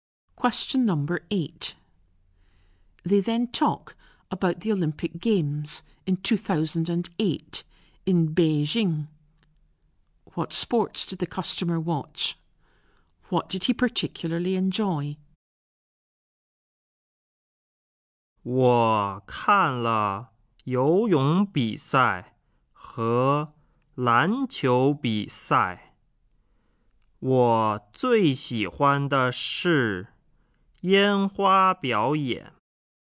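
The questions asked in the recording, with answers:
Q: What sports did the customer watch?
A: Swimming and basketball

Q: What did he particularly enjoy?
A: The fireworks display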